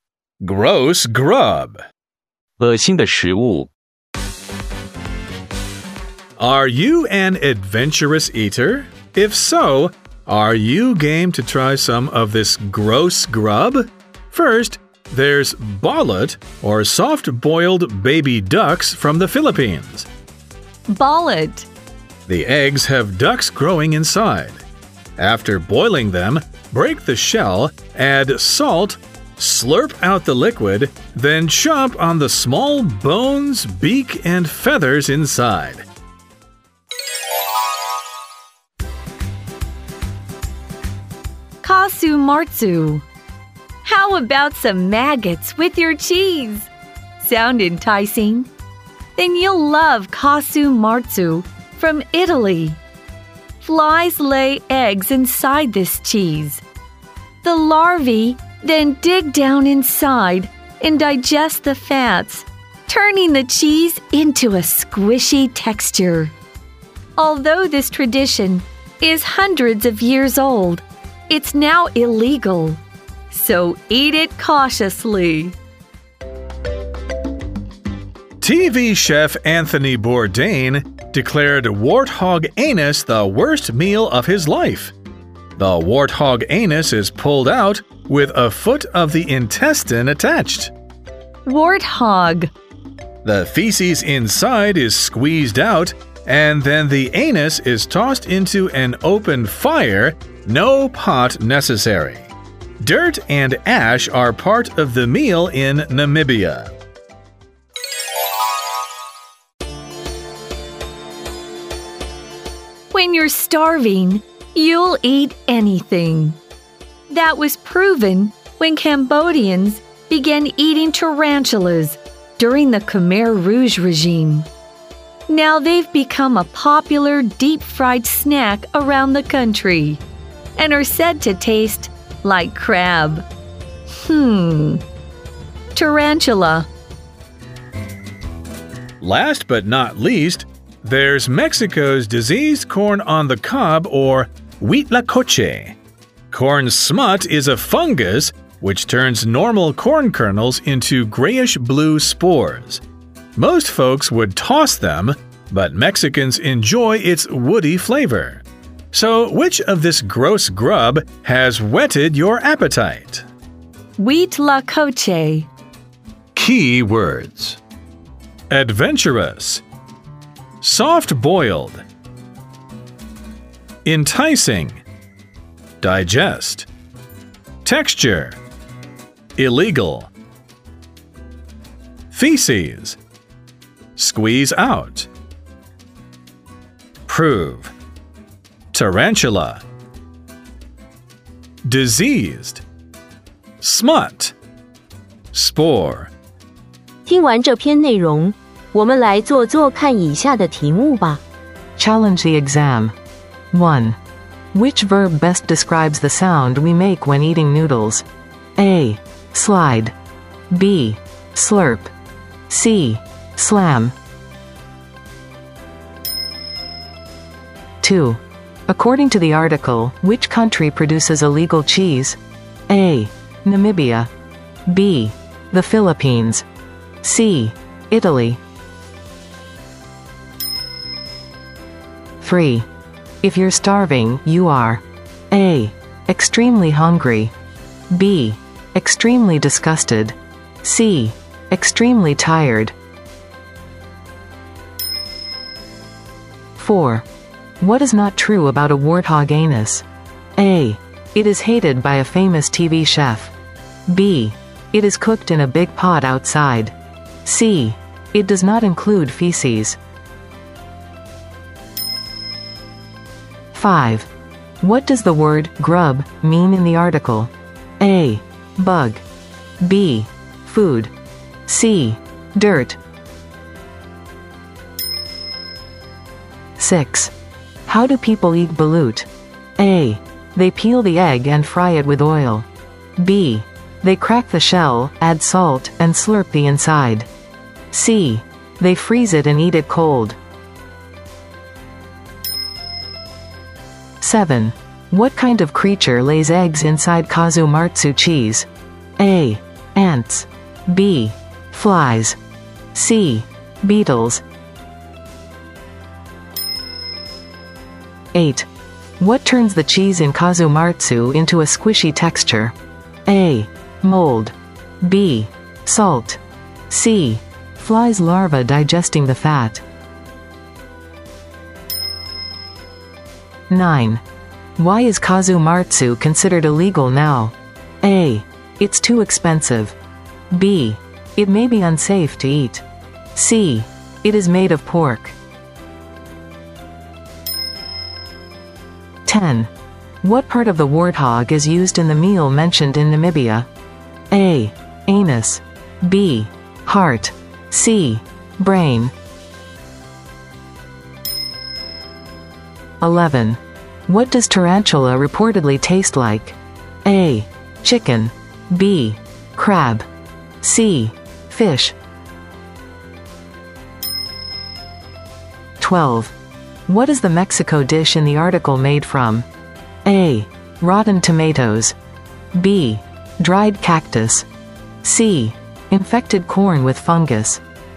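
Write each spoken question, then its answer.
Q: Which verb best describes the sound we make when eating noodles?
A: B: Slurp.

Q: According to the article, which country produces illegal cheese?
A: C: Italy.

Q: If you're starving, you are A.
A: A: Extremely hungry.

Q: What is not true about a warthog anus?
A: B: It is cooked in a big pot outside.

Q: What does the word grub mean in the article?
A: B: Food.

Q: How do people eat balut?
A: B: They crack the shell, add salt, and slurp the inside.

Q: What kind of creature lays eggs inside Kazumatsu cheese?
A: B: Flies.

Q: What turns the cheese in Kazumatsu into a squishy texture?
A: C: Flies larva digesting the fat.

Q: What part of the warthog is used in the meal mentioned in Namibia?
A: A: Anus.

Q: What does tarantula reportedly taste like?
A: B: Crab.

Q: What is the Mexico dish in the article made from?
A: C: Infected corn with fungus.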